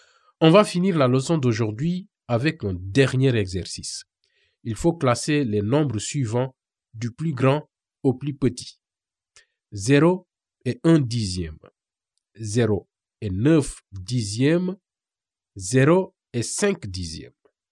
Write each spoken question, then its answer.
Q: Il faut classer les nombres suivants du plus grand au plus petit.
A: Du plus grand au plus petit, la réponse est 0 et 9 dixièmes, 0 et 5 dixièmes, puis 0 et 1 dixième.